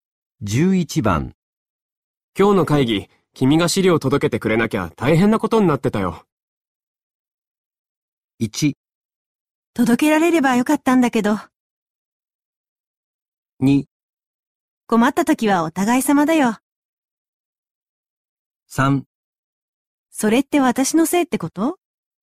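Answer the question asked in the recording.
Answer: 2: 困った時はお互い様だよ。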